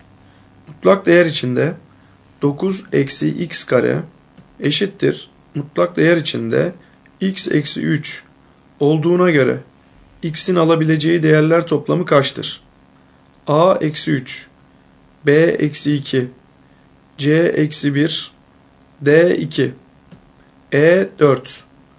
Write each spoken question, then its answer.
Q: Mutlak değer içinde 9 eksi x kare eşittir mutlak değer içinde x eksi 3 olduğuna göre x'in alabileceği değerler toplamı kaçtır?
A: Doğru cevap A eksi 3.